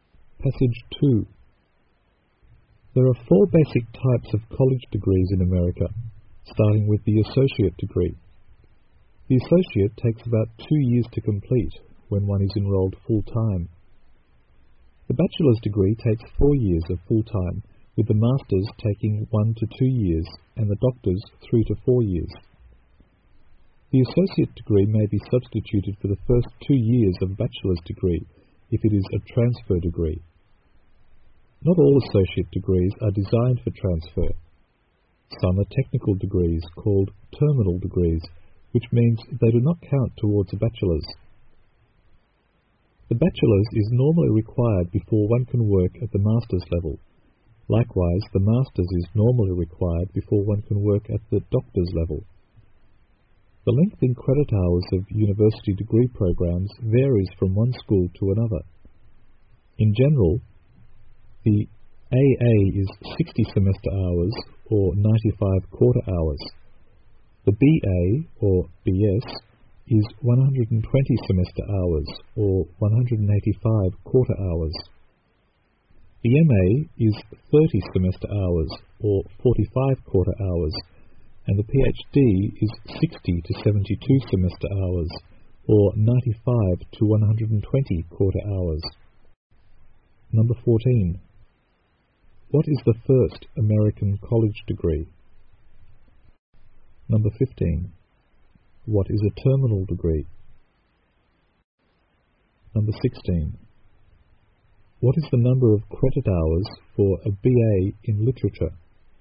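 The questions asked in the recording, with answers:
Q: What is the first American college degree?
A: The associate degree

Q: What is a terminal degree?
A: A technical associate degree that does not count towards a bachelor's

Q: What is the number of credit hours for a BA in literature?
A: 120 semester hours or 185 quarter hours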